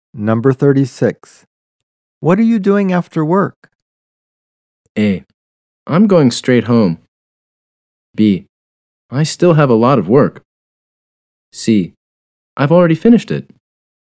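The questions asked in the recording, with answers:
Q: What are you doing after work?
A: A: I'm going straight home.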